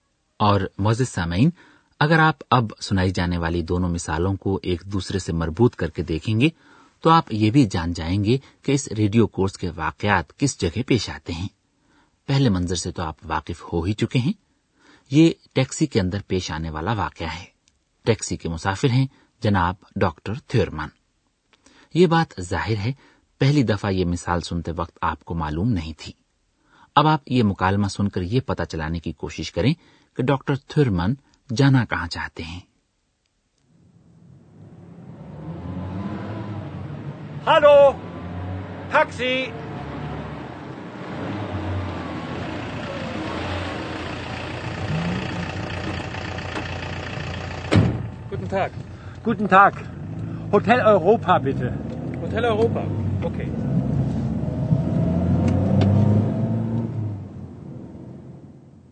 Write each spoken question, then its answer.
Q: اب آپ یہ مکالمہ سن کر یہ پتا چلانے کی کوشش کریں کہ doctor تھورمن جانا کہاں چاہتے ہیں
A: doctor تھورمن چاہتے ہیں کہ taxi driver انہیں hotel Europa hotel Europa لے چلے